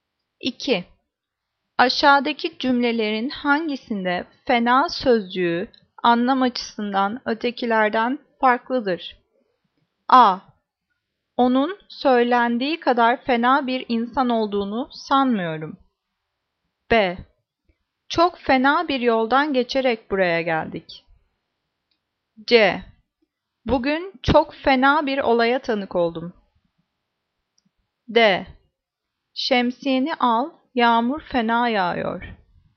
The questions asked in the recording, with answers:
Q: Aşağıdaki cümlelerin hangisinde fena sözcüğü anlam açısından ötekilerden farklıdır?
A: Cevap D. Şemsiyeni al, yağmur fena yağıyor.